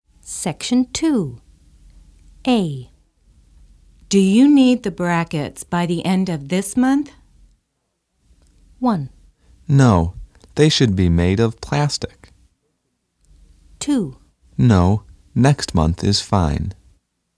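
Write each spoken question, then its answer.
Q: Do you need the brackets by the end of this month?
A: 2: No, next month is fine.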